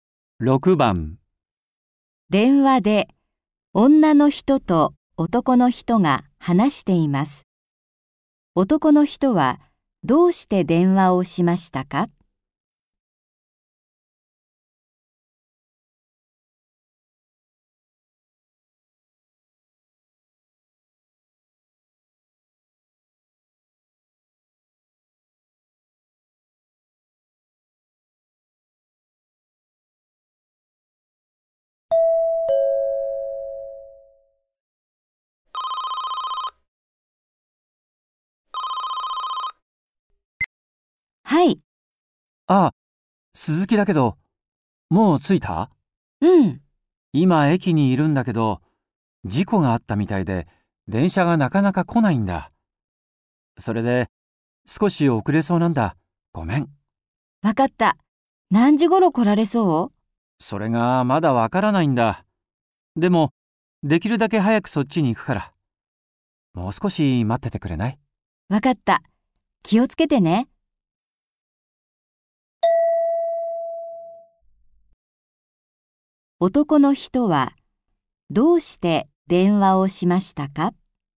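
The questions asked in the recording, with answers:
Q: 男の人はどうして電話をしましたか?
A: 電車が来なくて約束の時間に遅れるから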